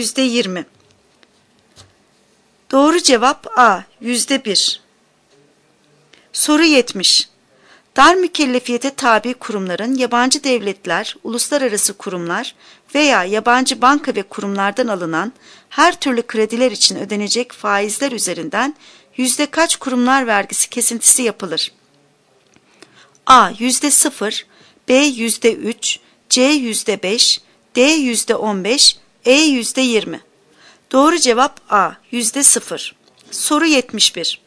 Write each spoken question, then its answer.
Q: Dar mükellefiyete tabi kurumların yabancı devletler, uluslararası kurumlar veya yabancı banka ve kurumlardan alınan her türlü krediler için ödenecek faizler üzerinden yüzde kaç kurumlar vergisi kesintisi yapılır?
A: Doğru cevap A. %0.